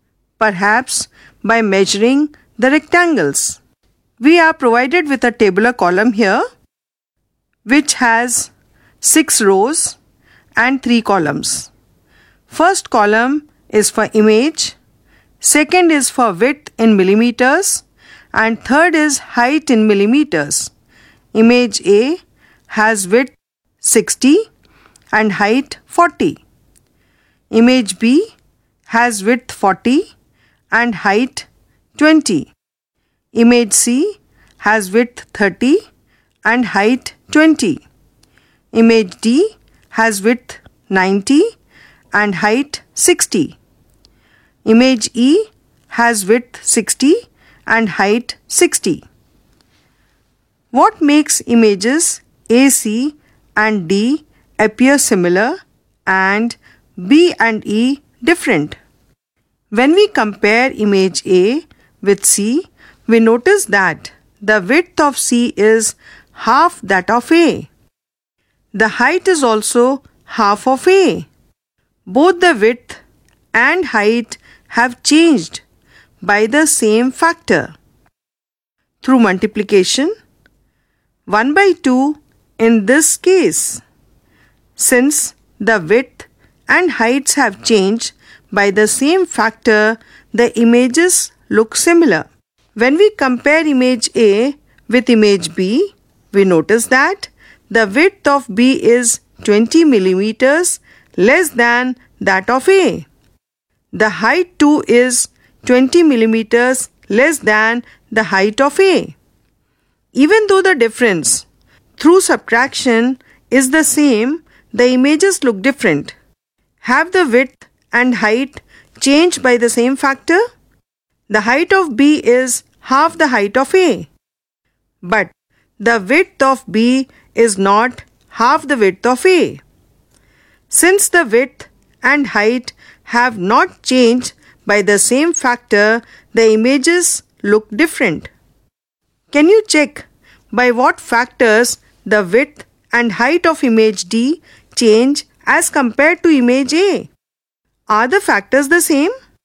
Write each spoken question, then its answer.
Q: Are the factors the same?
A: Images A, C and D look similar because their widths and heights have changed